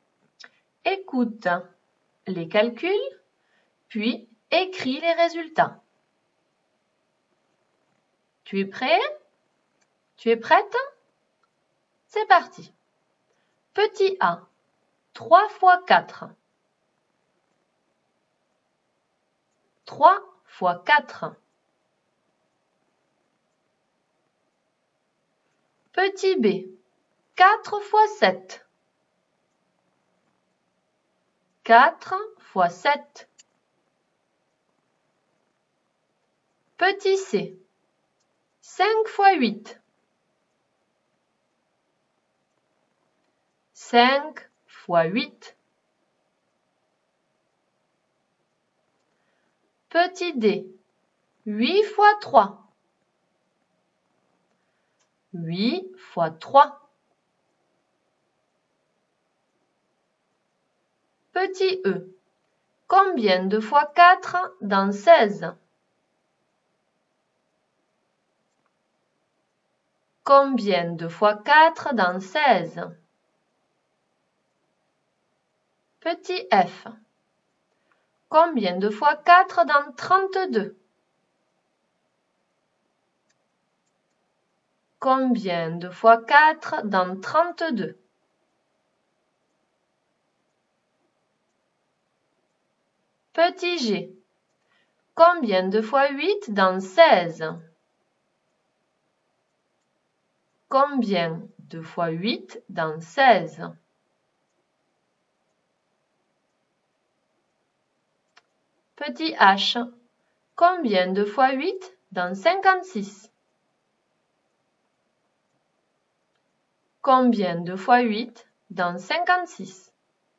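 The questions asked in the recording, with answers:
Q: 3 fois 4.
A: 12

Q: 4 fois 7.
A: 28

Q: 5 fois 8.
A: 40

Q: 8 fois 3.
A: 24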